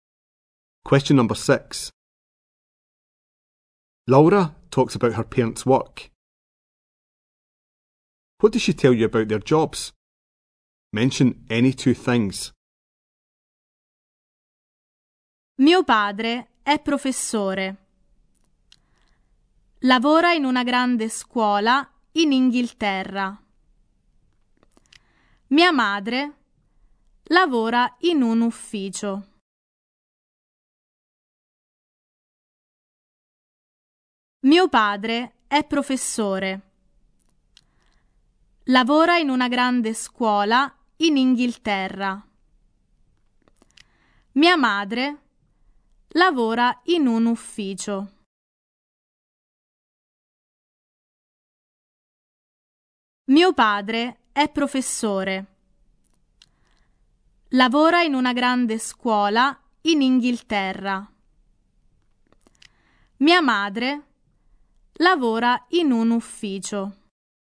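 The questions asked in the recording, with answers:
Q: What does she tell you about their jobs?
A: Father is a teacher in a big school in England; mother works in an office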